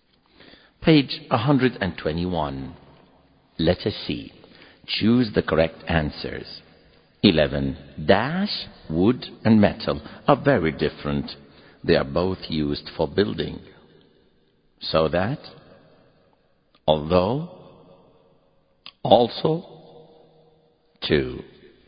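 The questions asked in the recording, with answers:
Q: Dash, wood, and metal are very different. They are both used for building. So that, although, also, too.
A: B: although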